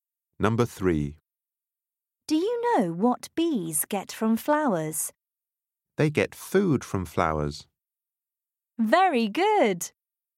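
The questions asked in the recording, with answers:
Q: Do you know what bees get from flowers?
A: food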